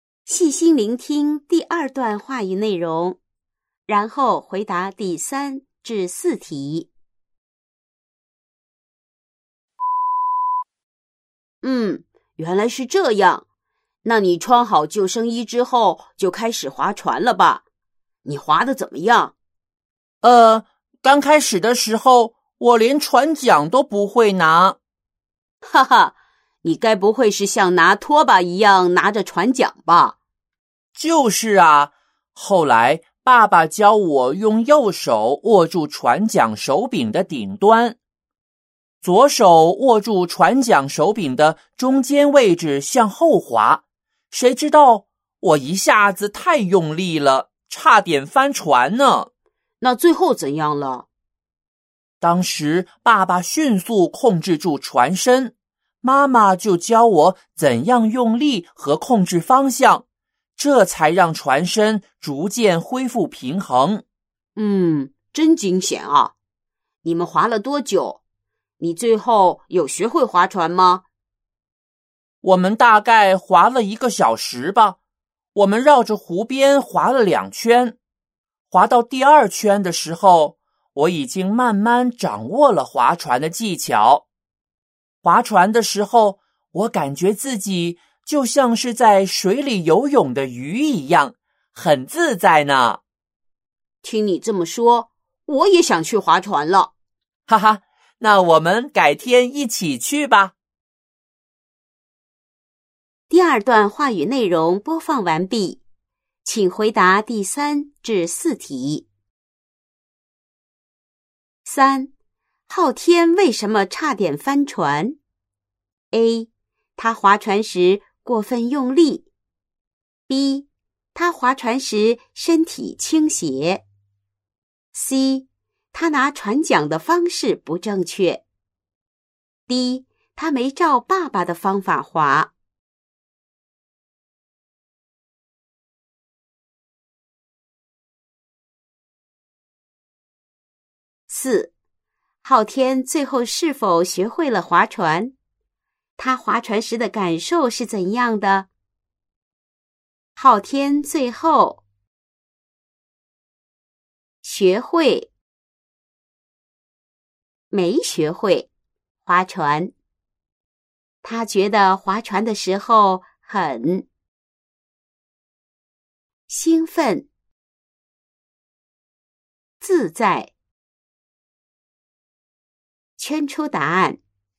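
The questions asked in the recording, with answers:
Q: 昊天为什么差点翻船?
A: A: 他划船时过分用力。

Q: 昊天最后是否学会了划船?他划船时的感受是怎样的?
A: 学会了划船;感觉很自在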